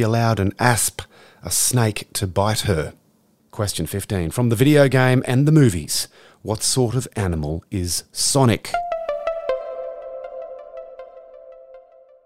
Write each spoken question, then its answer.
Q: From the video game and the movies, what sort of animal is Sonic?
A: He's a hedgehog.